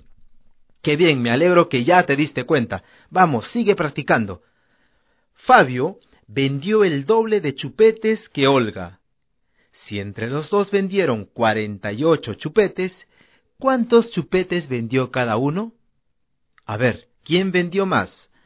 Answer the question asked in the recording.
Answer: Olga vendió 16 chupetes y Fabio vendió 32 chupetes.